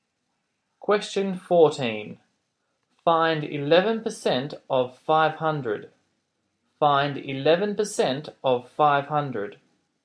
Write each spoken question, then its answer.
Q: Find 11% of 500.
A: your answer is 55.